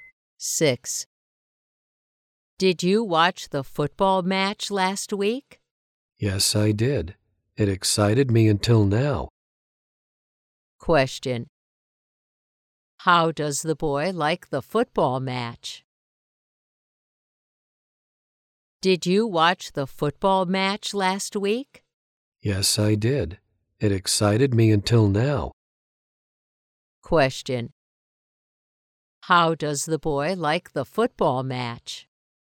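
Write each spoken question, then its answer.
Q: How does the boy like the football match?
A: It was exciting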